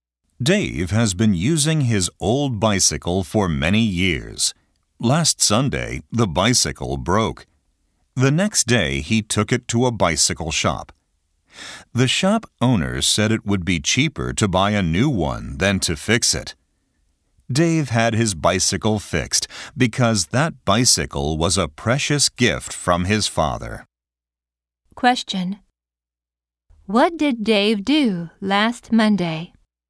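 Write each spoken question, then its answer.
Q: What did Dave do last Monday?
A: He took his bicycle to a bicycle shop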